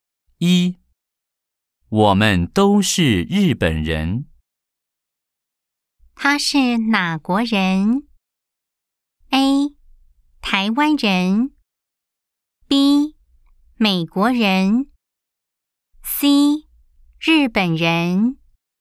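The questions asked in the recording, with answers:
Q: 他是哪国人?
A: C: 日本人。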